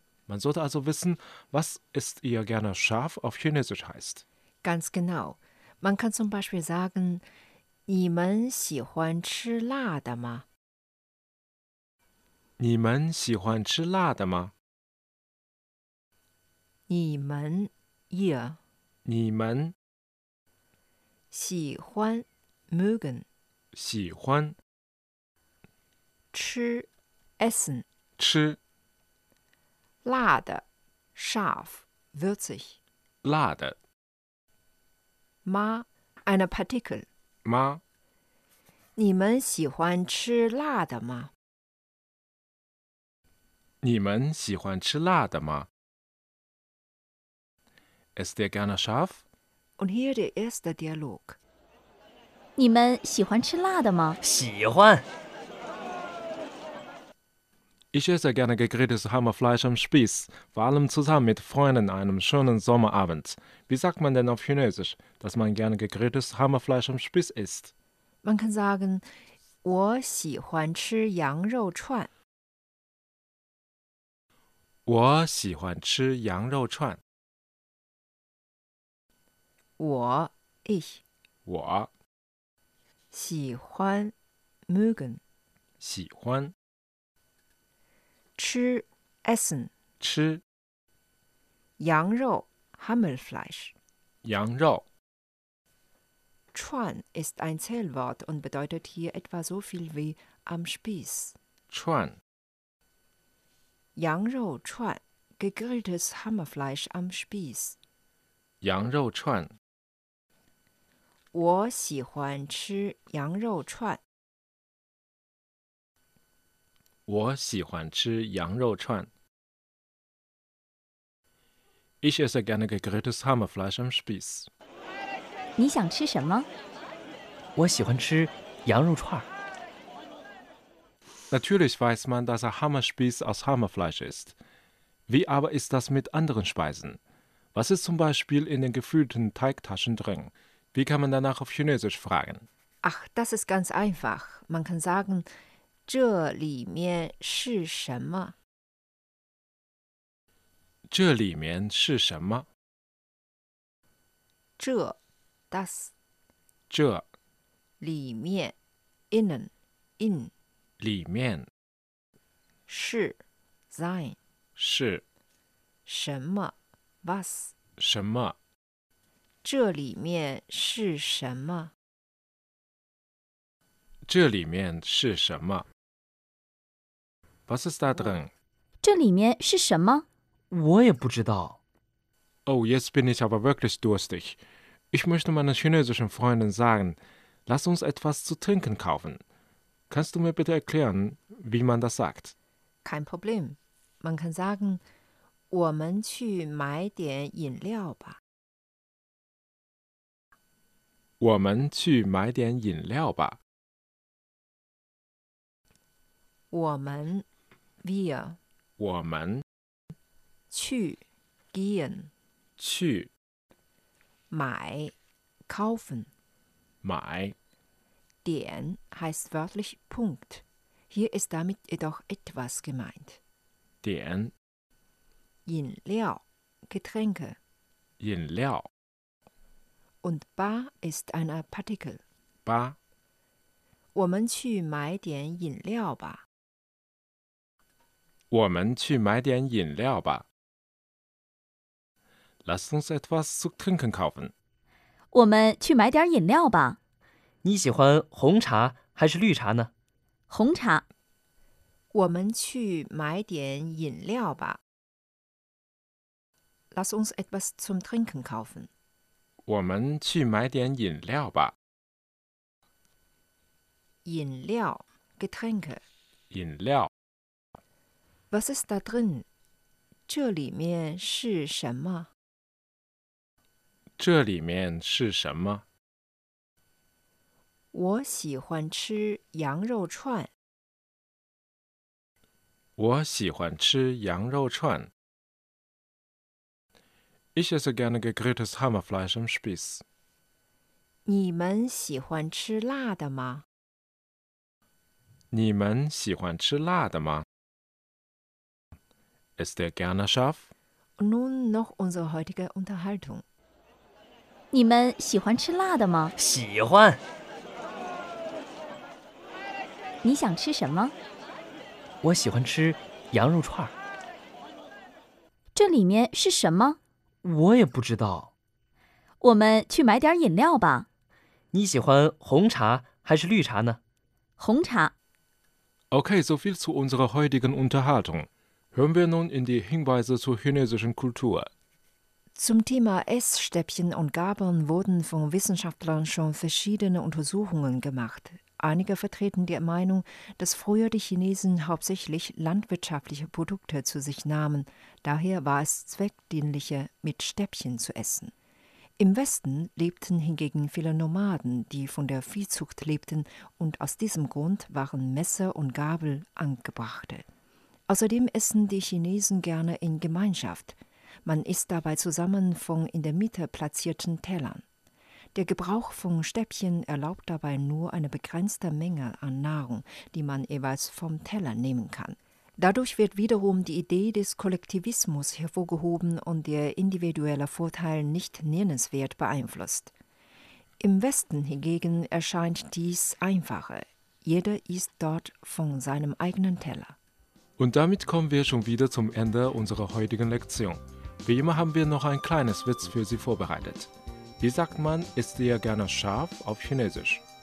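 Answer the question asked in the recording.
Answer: 你们喜欢吃辣的吗?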